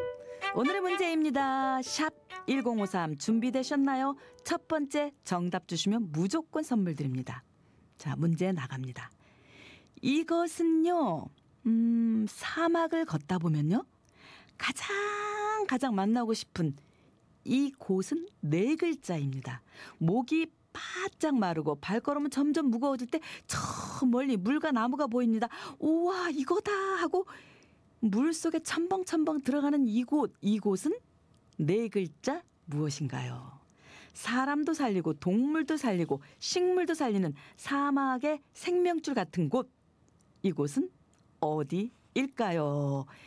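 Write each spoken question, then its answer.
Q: 우와, 이거다 하고 물 속에 첨벙첨벙 들어가는 이곳은 네 글자 무엇인가요?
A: 오아시스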